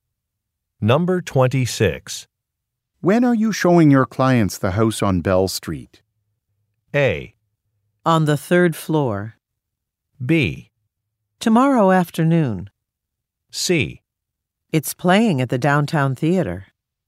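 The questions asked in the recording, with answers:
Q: When are you showing your clients the house on Bell Street?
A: B: Tomorrow afternoon.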